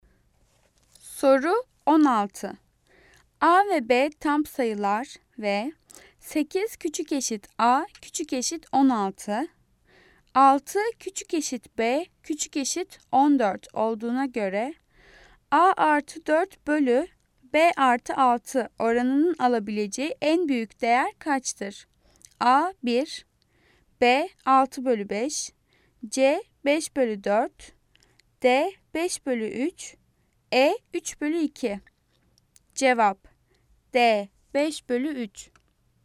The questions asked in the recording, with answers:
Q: A ve B tam sayılar ve 8 küçük eşit A küçük eşit 16, 6 küçük eşit B küçük eşit 14 olduğuna göre A artı 4 bölü B artı 6 oranının alabileceği en büyük değer kaçtır?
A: Cevap D 5 bölü 3.